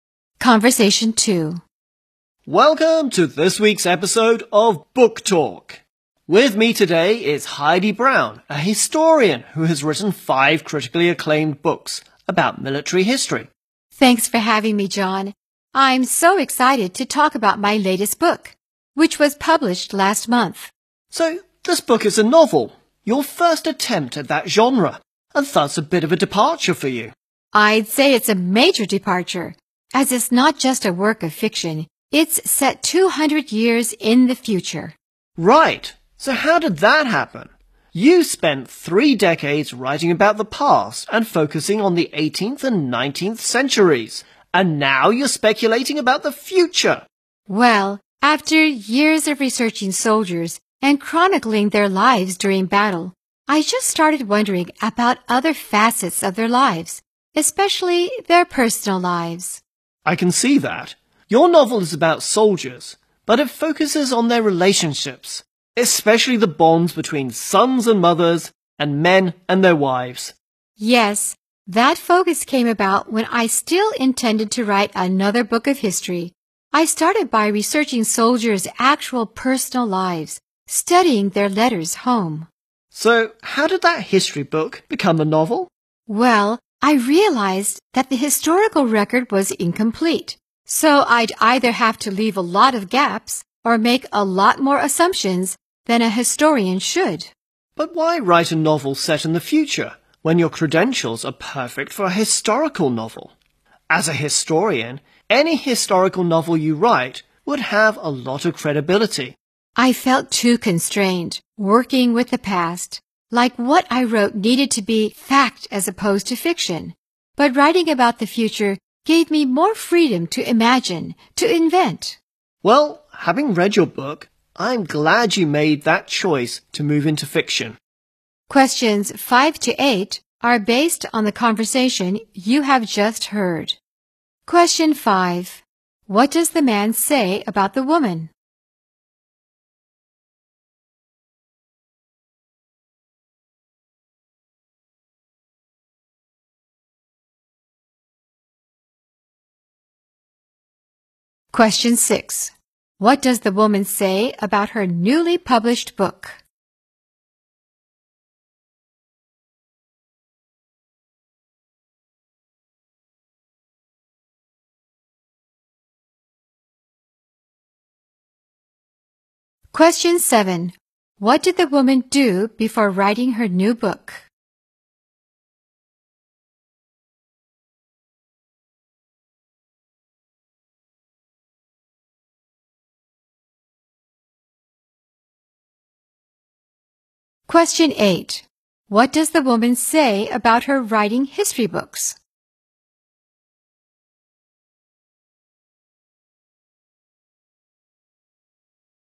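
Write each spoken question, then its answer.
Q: What does the man say about the woman?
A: She is a historian who has written five critically acclaimed books about military history.

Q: What does the woman say about her newly published book?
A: It is a novel set 200 years in the future, a major departure for her.

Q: What does the woman say about her writing history books?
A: She felt too constrained, because what she wrote had to be fact.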